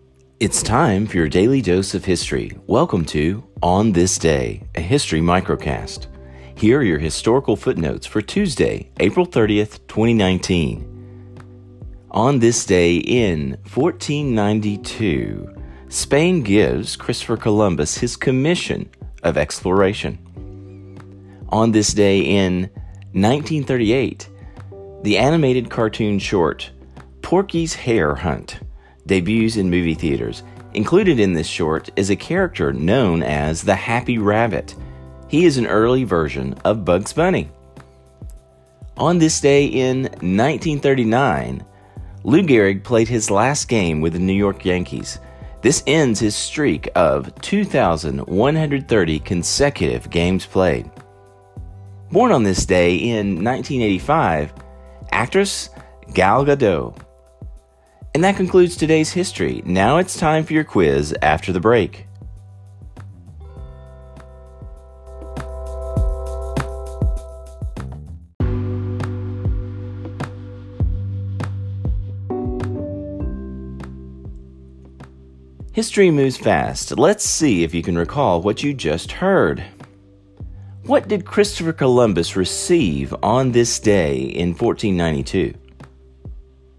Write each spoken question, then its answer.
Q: What did Christopher Columbus receive on this day in 1492?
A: his commission of exploration from Spain.